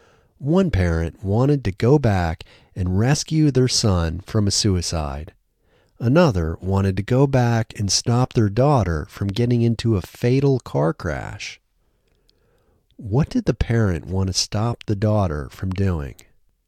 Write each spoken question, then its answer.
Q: What did the parent want to stop the daughter from doing?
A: The parent wanted to stop the daughter from getting into a fatal car crash.